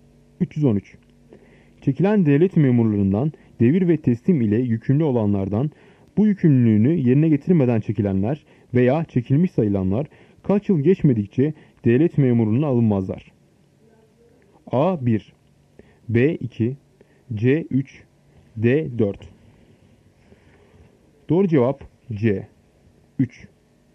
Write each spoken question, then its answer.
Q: Çekilen devlet memurlarından devir ve teslim ile yükümlü olanlardan bu yükümlülüğünü yerine getirmeden çekilenler veya çekilmiş sayılanlar kaç yıl geçmedikçe devlet memurluğuna alınmazlar?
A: Doğru cevap C 3.